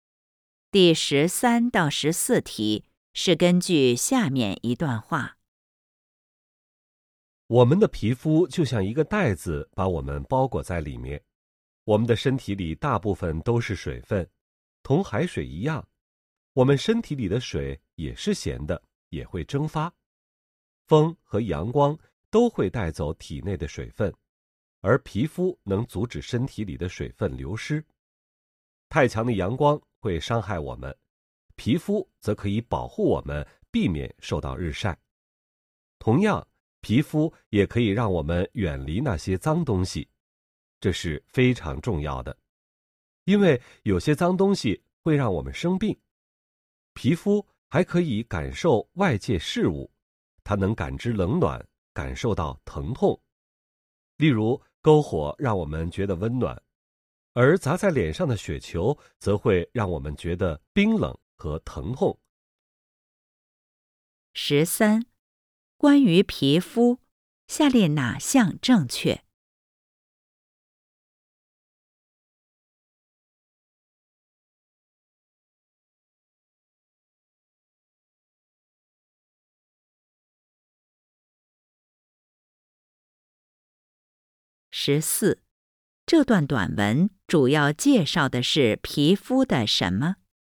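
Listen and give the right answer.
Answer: 皮肤的作用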